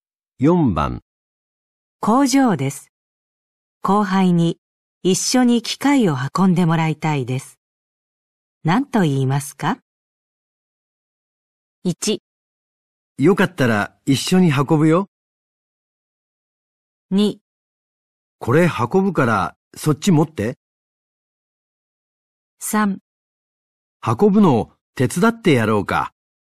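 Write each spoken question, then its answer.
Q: 工場です。後輩に一緒に機械を運んでもらいたいです。何と言いますか?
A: 2: これ運ぶからそっち持って。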